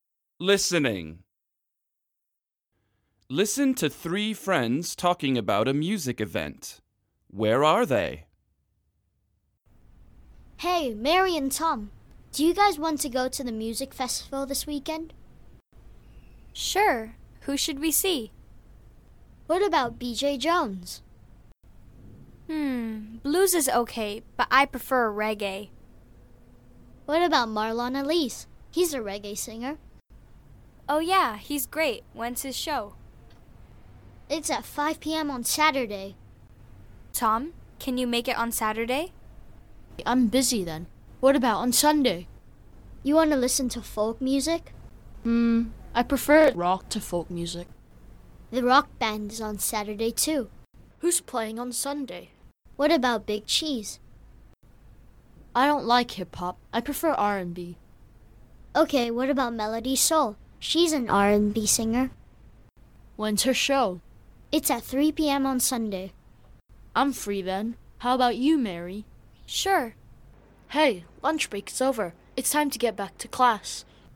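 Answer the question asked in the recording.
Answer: At school (during lunch break)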